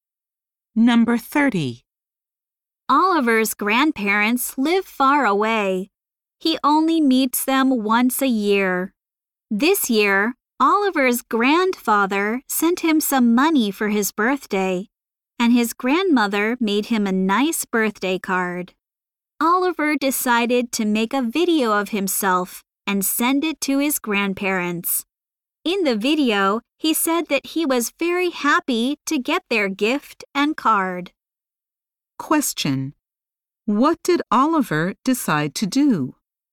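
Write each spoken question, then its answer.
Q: What did Oliver decide to do?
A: Make a video of himself and send it to his grandparents.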